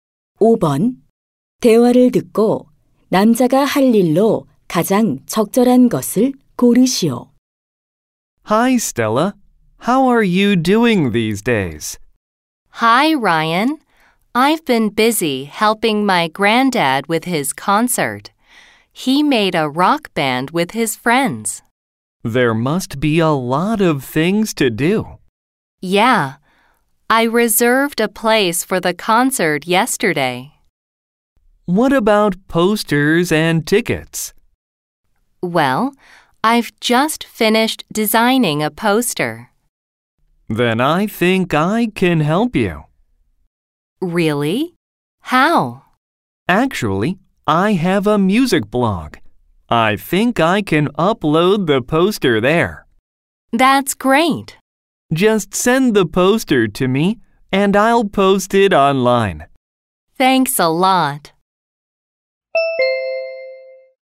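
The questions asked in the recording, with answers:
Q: 대화를 듣고 남자가 할 일로 가장 적절한 것을 고르시오.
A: 자기 블로그에 포스터 올리기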